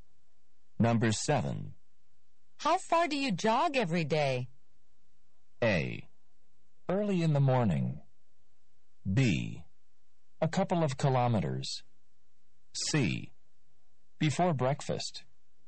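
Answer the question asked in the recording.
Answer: B: A couple of kilometers.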